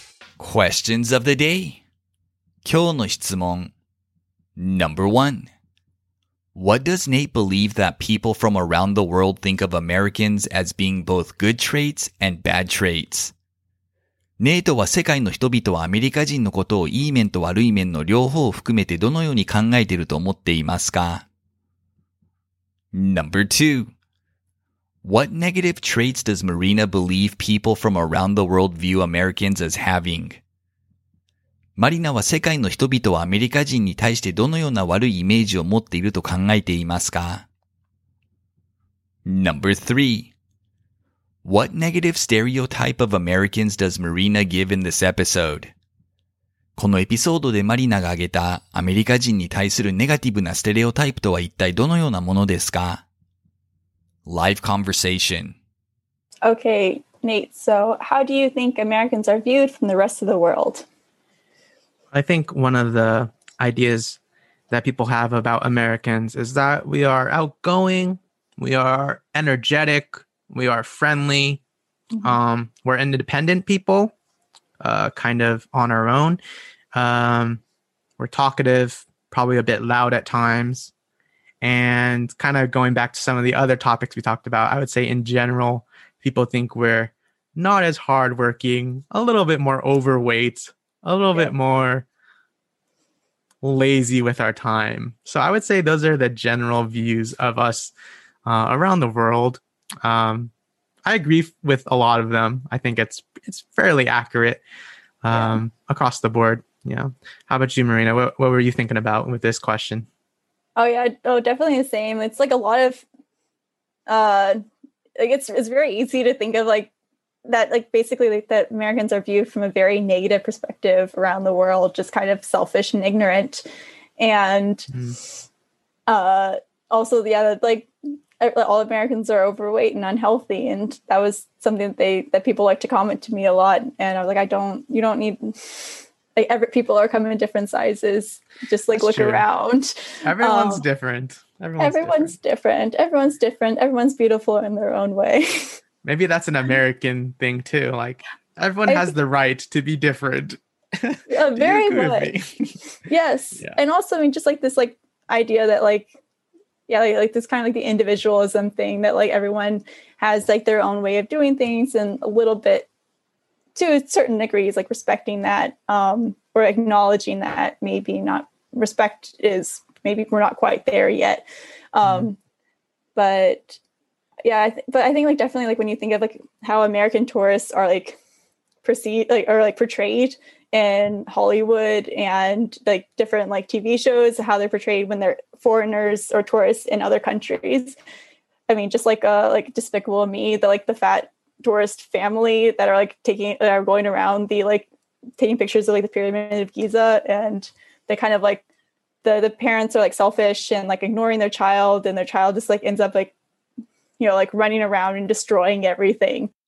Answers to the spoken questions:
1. He thinks people from around the world view Americans as energetic and outgoing, but also overweight, lazy, and loud.
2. She thinks people from around the world view Americans as often selfish and ignorant.
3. She gives the example of the ignorant, disrespectful American tourist stereotype, evoking the image of a family of overweight tourists oblivious to the culture around them and only caring about themselves.